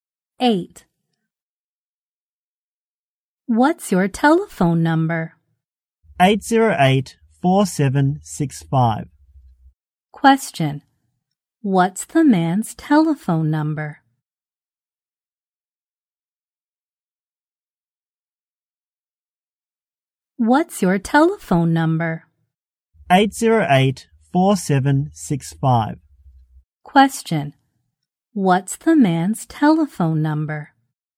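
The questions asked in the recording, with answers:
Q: Question, what's the man's telephone number?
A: 808-4765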